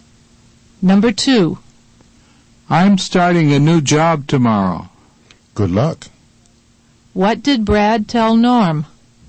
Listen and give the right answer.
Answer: He told Norm he was starting a new job tomorrow.